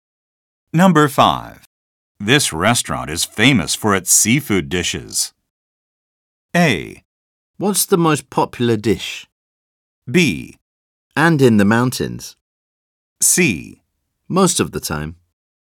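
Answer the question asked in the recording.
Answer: A: What's the most popular dish?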